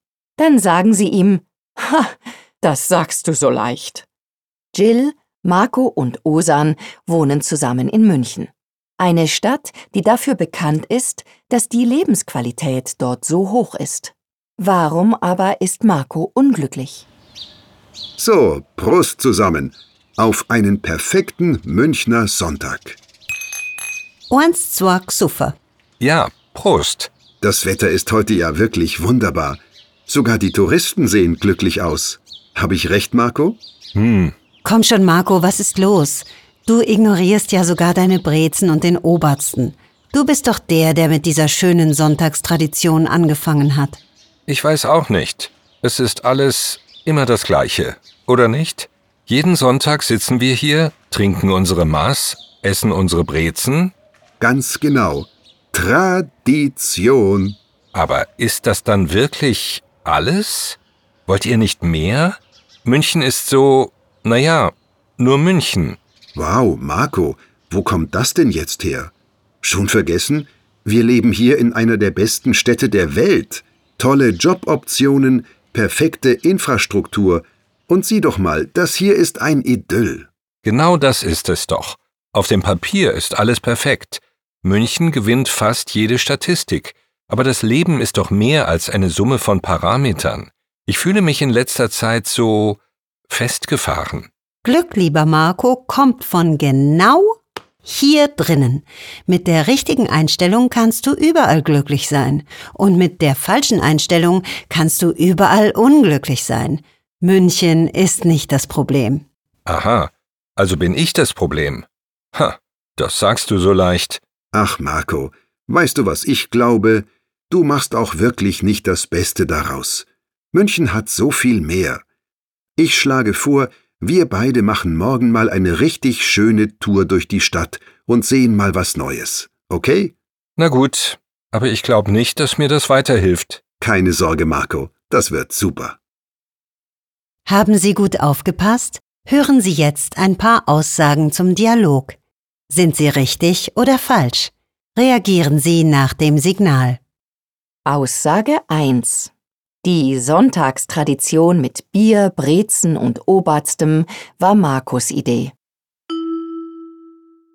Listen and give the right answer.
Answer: Richtig.